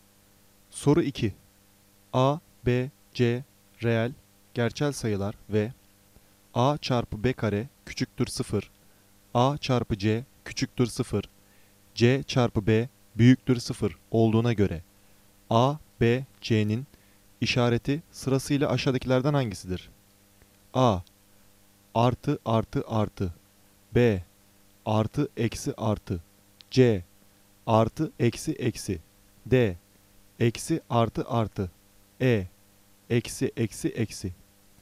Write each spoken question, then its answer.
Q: A, B, C, reel, gerçel sayılar ve A çarpı B kare küçüktür 0, A çarpı C küçüktür 0, C çarpı B büyüktür 0 olduğuna göre A, B, C'nin işareti sırasıyla aşağıdakilerden hangisidir?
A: Doğru cevap D. Eksi artı artı.